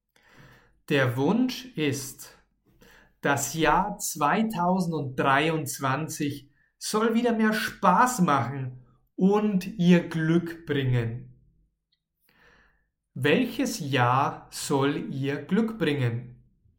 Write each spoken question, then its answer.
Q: Welches Jahr soll ihr Glück bringen?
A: 2023. Dieses Jahr das nächste Jahr soll ihr Glück bringen.